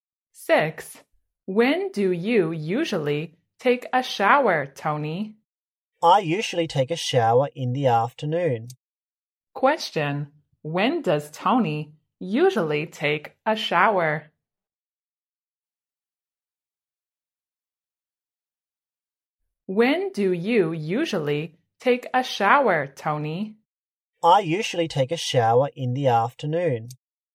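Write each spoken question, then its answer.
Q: When does Tony usually take a shower?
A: In the afternoon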